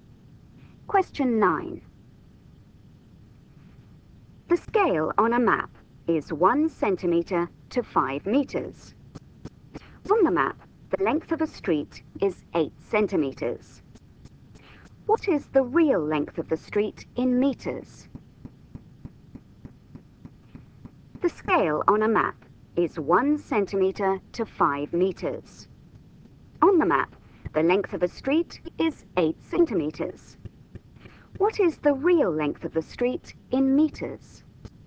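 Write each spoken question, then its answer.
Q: What is the real length of the street in meters?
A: 40 meters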